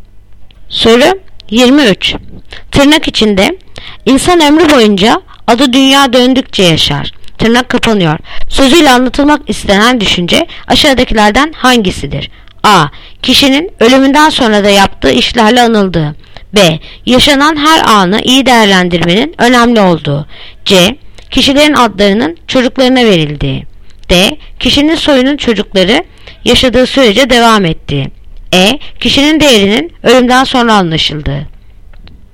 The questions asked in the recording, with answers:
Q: Sözüyle anlatılmak istenen düşünce aşağıdakilerden hangisidir?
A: Yanıt Adana. Kişinin ölümünden sonra da yaptığı işlerle anıldığı.